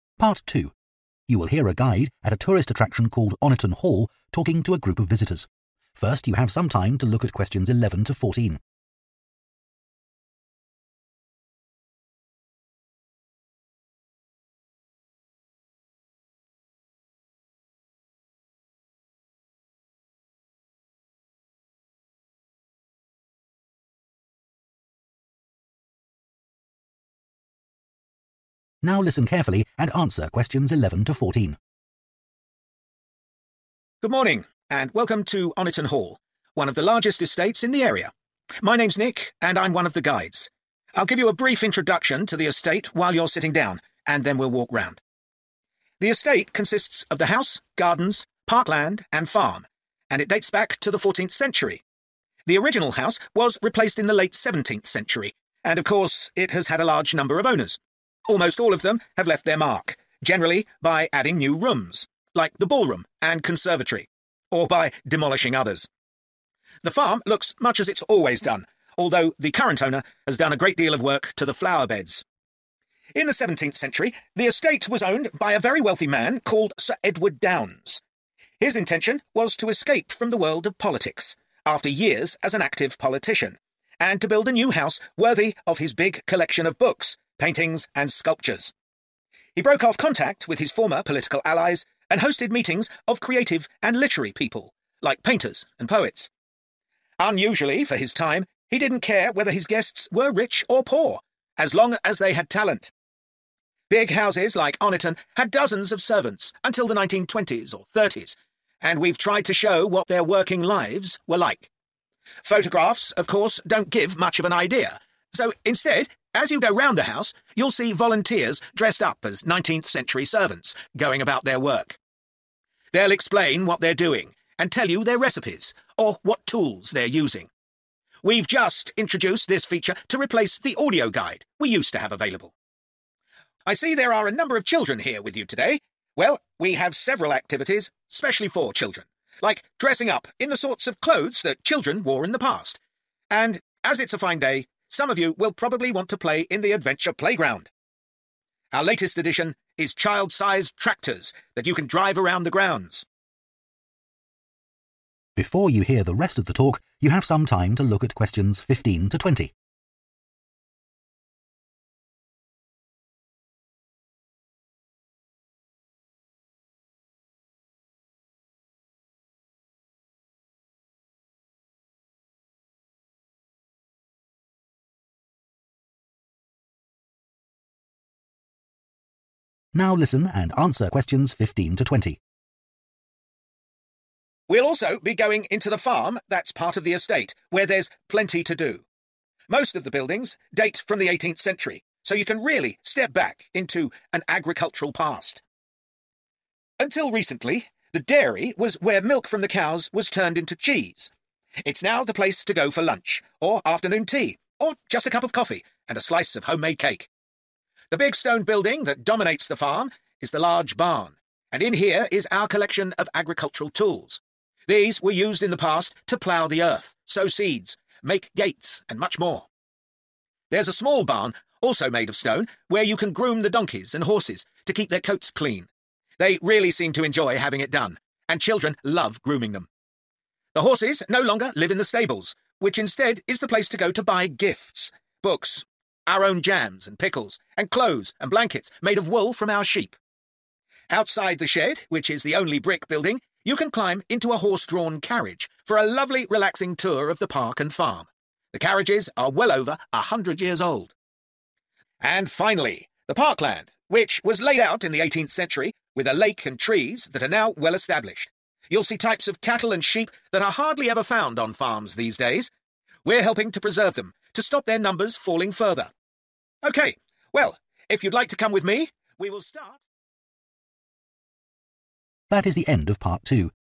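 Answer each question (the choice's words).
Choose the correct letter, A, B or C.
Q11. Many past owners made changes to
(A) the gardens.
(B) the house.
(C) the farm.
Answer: the house.

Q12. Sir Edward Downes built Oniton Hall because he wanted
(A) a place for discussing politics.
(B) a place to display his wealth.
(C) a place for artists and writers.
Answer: a place for artists and writers.

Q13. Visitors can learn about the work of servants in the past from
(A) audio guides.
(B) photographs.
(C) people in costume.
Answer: people in costume.

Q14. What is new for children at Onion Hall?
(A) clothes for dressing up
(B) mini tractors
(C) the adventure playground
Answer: mini tractors

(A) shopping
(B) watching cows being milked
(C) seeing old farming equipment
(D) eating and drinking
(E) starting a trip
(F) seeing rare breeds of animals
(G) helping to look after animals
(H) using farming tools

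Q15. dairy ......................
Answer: eating and drinking

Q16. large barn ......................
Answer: seeing old farming equipment

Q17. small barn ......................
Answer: helping to look after animals

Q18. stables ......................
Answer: shopping

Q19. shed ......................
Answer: starting a trip

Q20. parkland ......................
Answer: seeing rare breeds of animals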